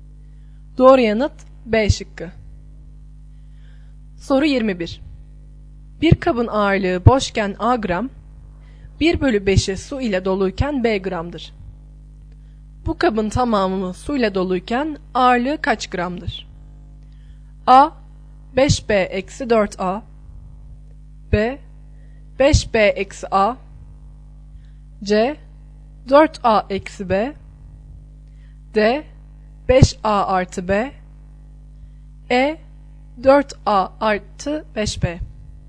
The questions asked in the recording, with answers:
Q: Bu kabın tamamı su ile doluyken ağırlığı kaç gramdır?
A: Doğru yanıt A şıkkı.